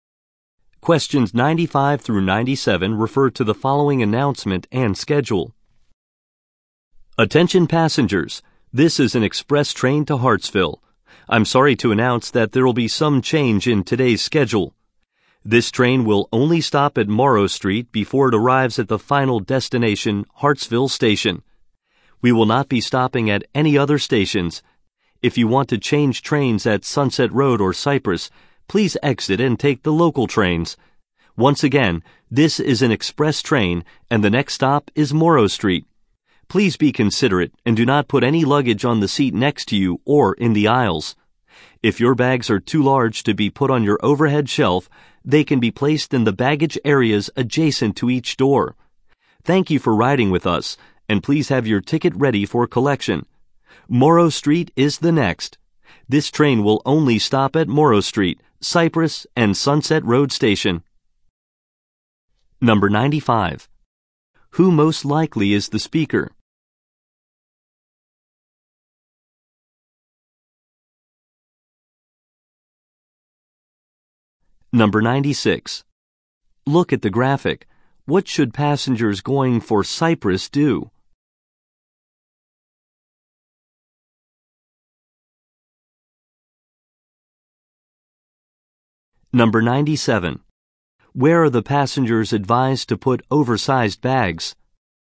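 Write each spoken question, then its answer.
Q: Who most likely is the speaker?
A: A train conductor

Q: Where are the passengers advised to put oversized bags?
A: In the baggage areas next to each door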